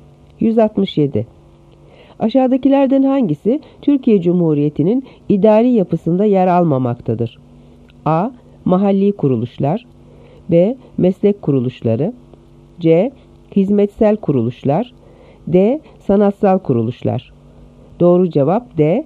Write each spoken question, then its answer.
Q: Aşağıdakilerden hangisi Türkiye Cumhuriyeti'nin idari yapısında yer almamaktadır?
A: Doğru cevap D. Sanatsal kuruluşlar.